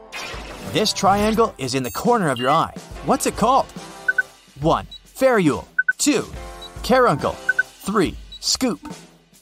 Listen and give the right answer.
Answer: It's the caruncle.